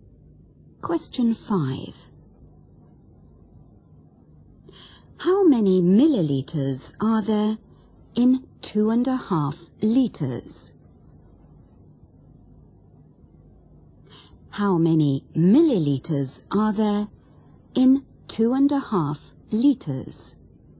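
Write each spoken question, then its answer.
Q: How many milliliters are there in 2.5 liters?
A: 2500 ml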